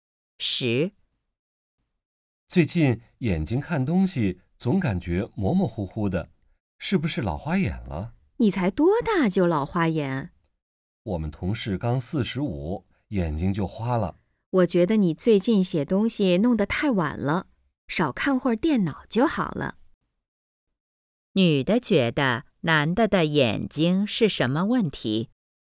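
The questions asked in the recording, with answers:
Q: 女的觉得男的的眼睛是什么问题?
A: 用眼过度,看电脑太多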